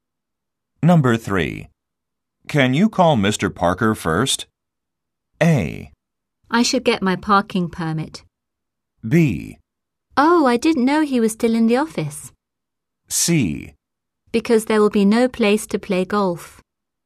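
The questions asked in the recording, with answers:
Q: Can you call Mr.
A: B: Oh, I didn't know he was still in the office.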